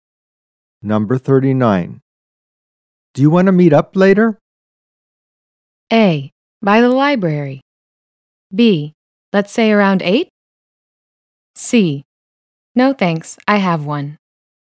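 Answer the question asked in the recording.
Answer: B: Let's say around 8?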